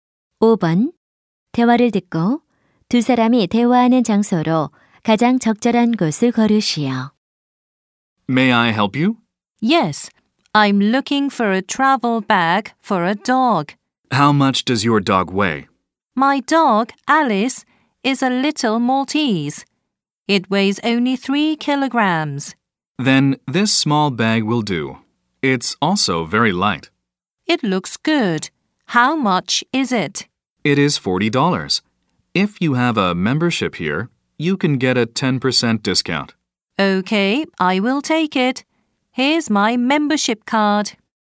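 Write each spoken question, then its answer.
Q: 대화를 듣고 두 사람이 대화하는 장소로 가장 적절한 곳을 고르시오.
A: 애완동물 용품점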